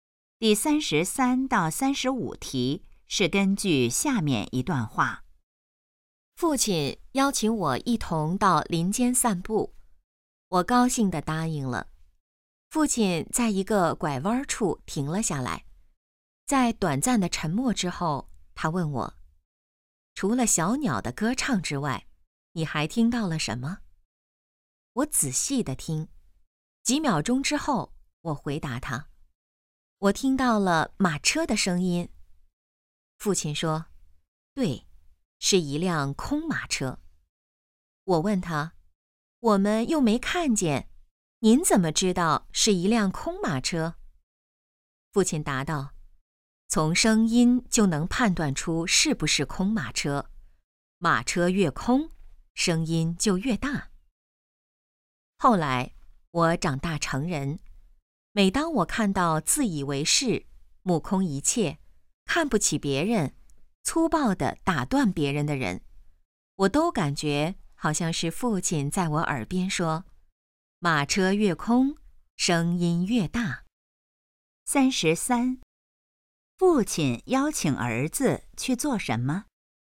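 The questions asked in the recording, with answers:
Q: 父亲邀请儿子去做什么?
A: 到林间散步

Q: 父亲根据什么判断那辆马车是空的?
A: 声音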